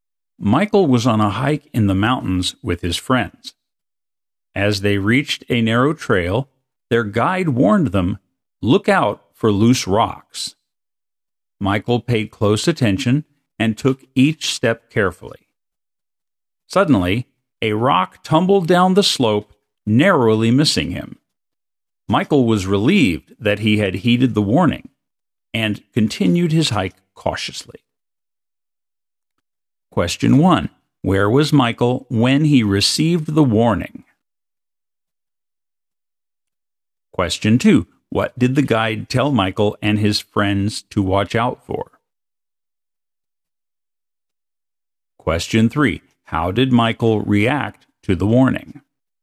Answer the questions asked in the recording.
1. He was on a narrow trail.
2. to watch out for loose rocks.
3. Michael paid close attention and took each step carefully.